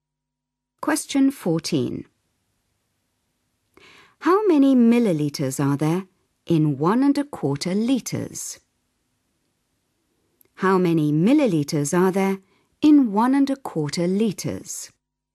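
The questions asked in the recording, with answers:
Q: How many millilitres are there in 11⁄4 litres?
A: 1250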